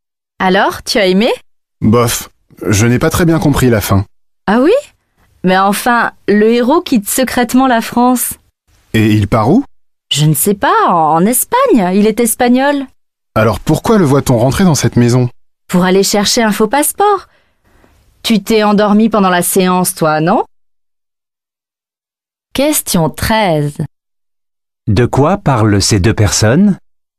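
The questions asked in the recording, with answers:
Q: De quoi parlent ces deux personnes?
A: D'un film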